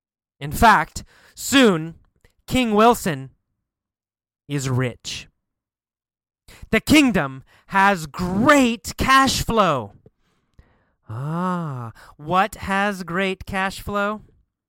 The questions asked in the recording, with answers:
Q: Ah, what has great cash flow?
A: The kingdom. The kingdom of monkeys has great cash flow.